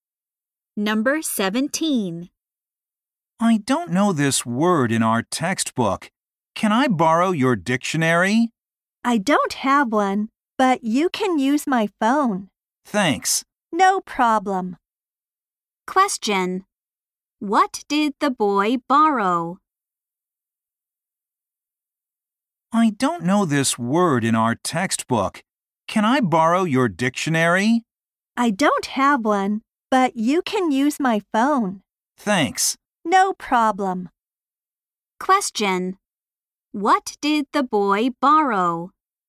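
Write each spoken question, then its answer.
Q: What did the boy borrow?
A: A phone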